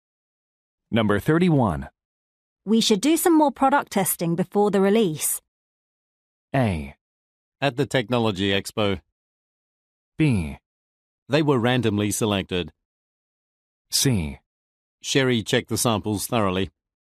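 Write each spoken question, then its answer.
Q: We should do some more product testing before the release.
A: C: Sherry checked the samples thoroughly.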